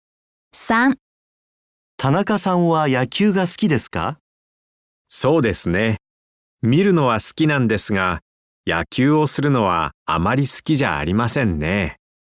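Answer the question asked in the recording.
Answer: 見るのは好きですが、するのはあまり好きじゃありません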